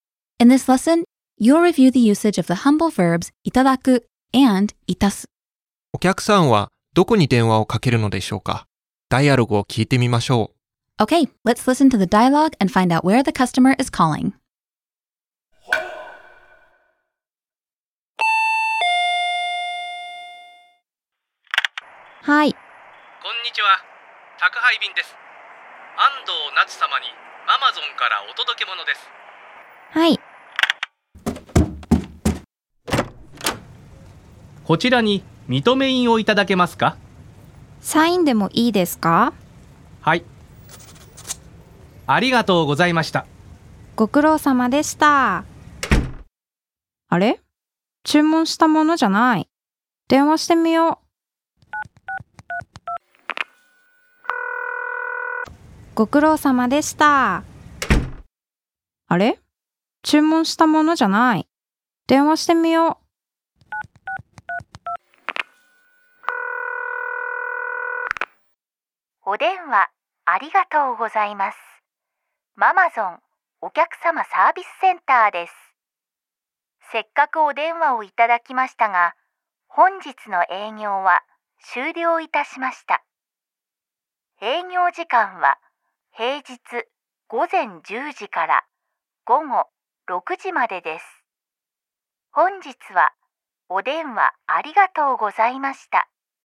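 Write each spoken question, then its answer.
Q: お客さんはどこに電話をかけるのでしょうか?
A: アマゾンお客様サービスセンター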